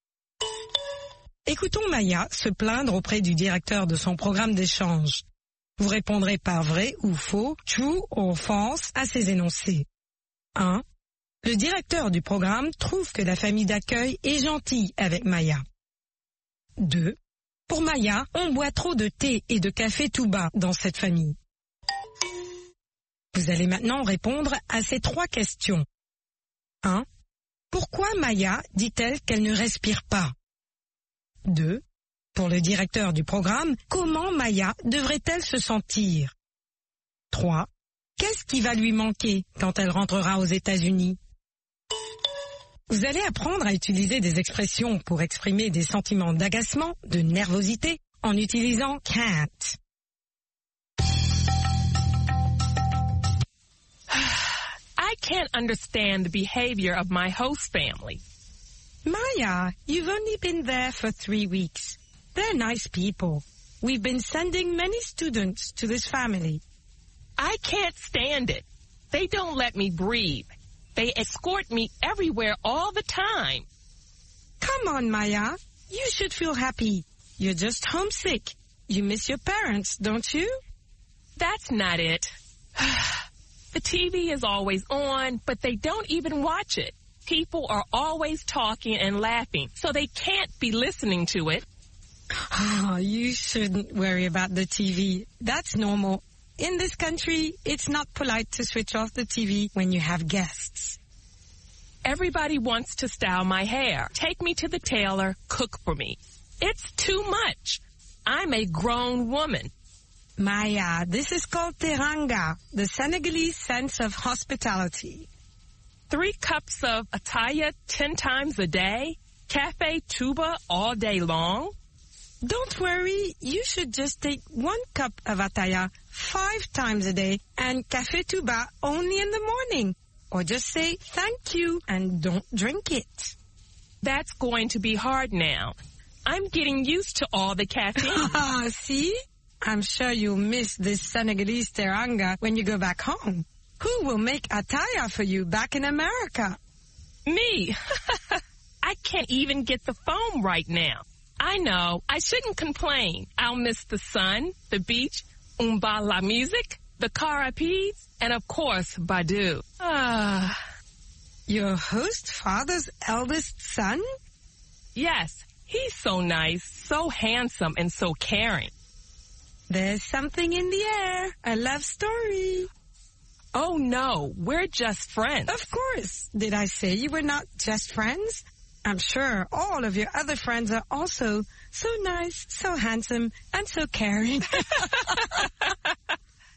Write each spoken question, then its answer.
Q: Le directeur du programme trouve que la famille d'accueil est gentille avec Maya.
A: L'énoncé 1 est vrai.

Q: Pour Maya, on boit trop de thé et de café tout bas dans cette famille.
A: L'énoncé 2 est vrai.

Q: Pourquoi Maya dit-elle qu'elle ne respire pas?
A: Parce qu'on l'escorte toujours, partout.

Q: Pour le directeur du programme, comment Maya devrait-elle se sentir?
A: Heureuse.